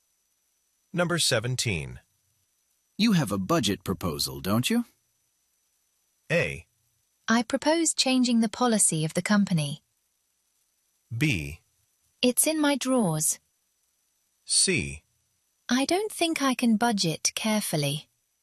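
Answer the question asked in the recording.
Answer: B: It's in my drawers.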